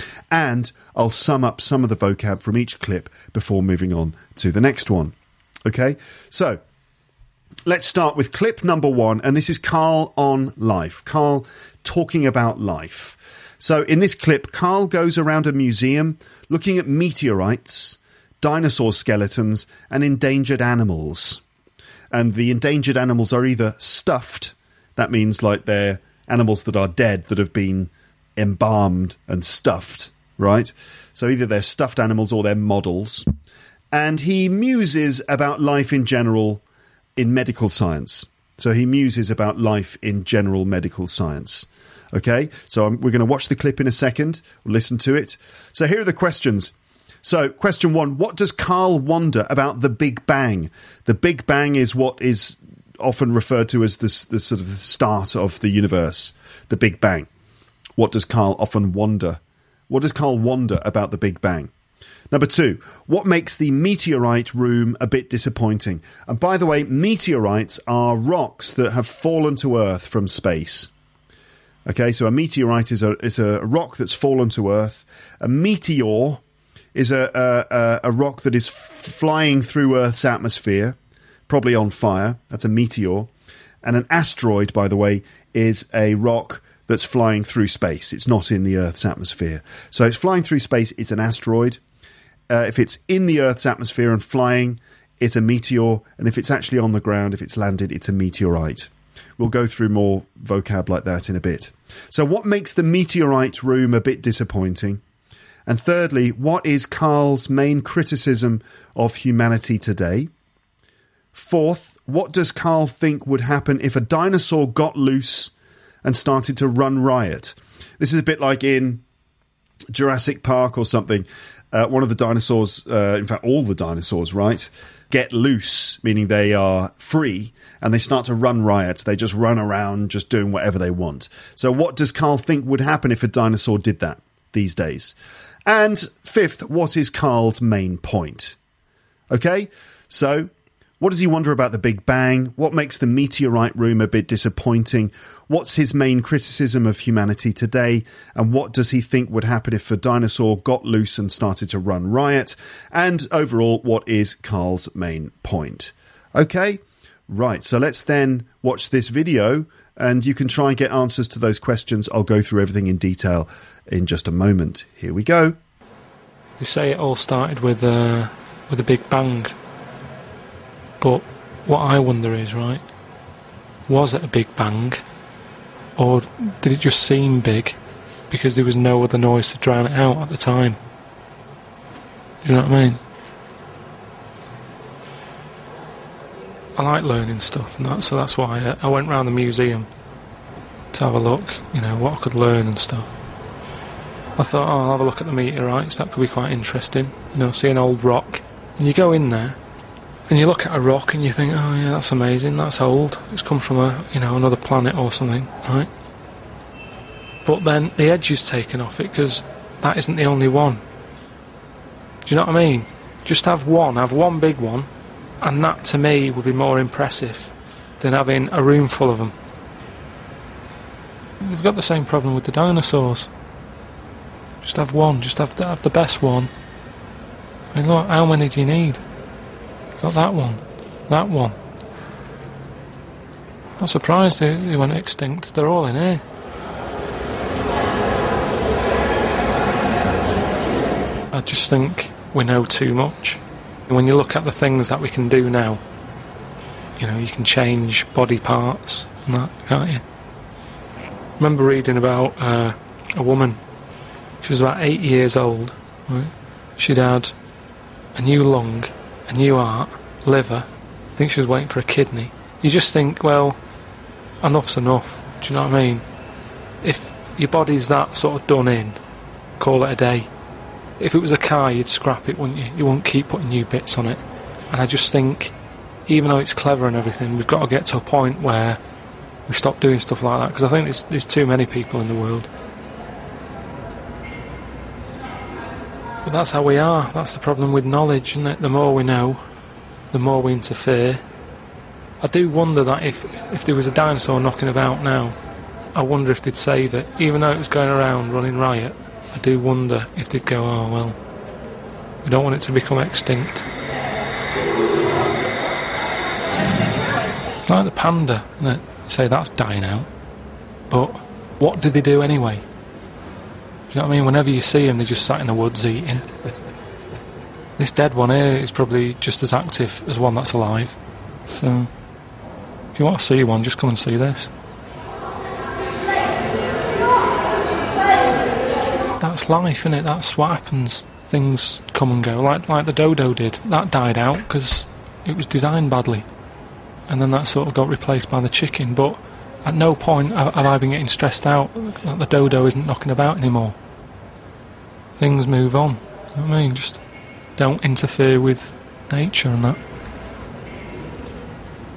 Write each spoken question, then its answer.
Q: What does Carl wonder about the Big Bang?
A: he said they call it the Big Bang, but maybe they just called it that because it seemed big at the time, but only because there was no other noise to drown it out.

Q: what makes the meteorite room a bit disappointing?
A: So the thing that he finds disappointing about it is the fact that there's loads of meteorites in there, which he feels, I think, means that the meteorites are no longer special anymore individually.

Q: what is Carl's main criticism of humanity today?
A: It's his main criticism is basically that we've gone too far, that we interfere too much.

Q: what does Carl think would happen if a dinosaur got loose and started to run riot?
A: he thinks that scientists or whatever would want to save it.

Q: what is Carl's main point?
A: It's just don't interfere with nature.